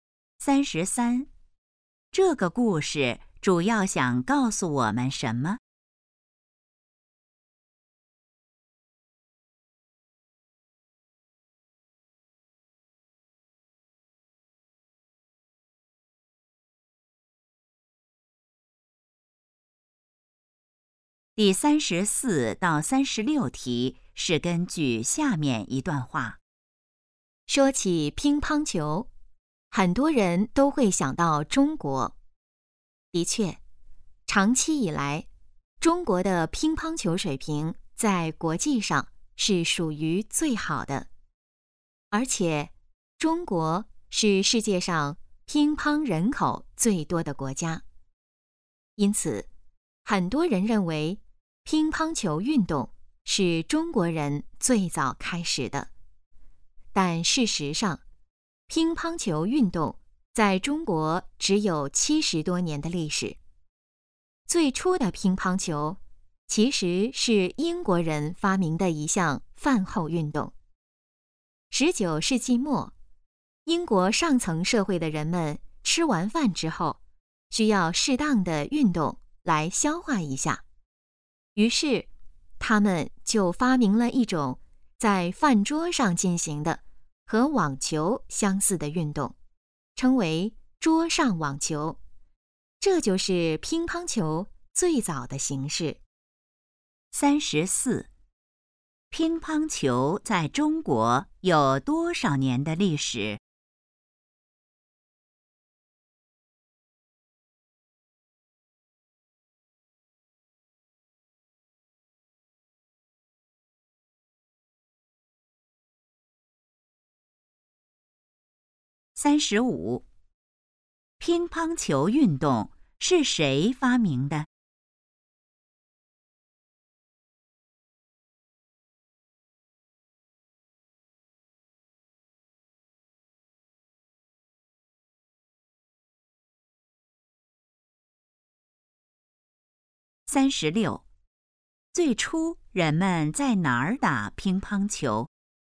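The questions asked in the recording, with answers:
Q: 乒乓球在中国有多少年的历史?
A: 70多年

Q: 乒乓球运动是谁发明的?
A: 英国人

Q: 最初人们在哪儿打乒乓球?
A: 饭桌上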